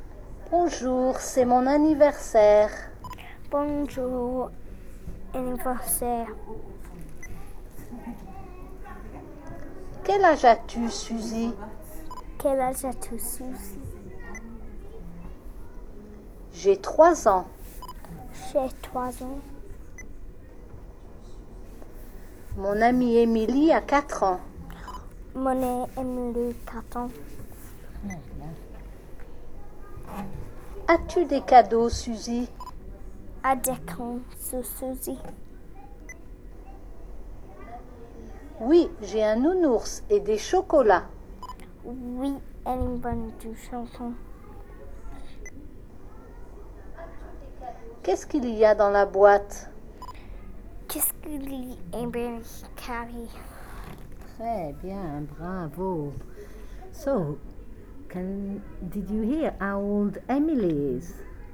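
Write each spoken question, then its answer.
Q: So, did you hear how old Emily is?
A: 4 years old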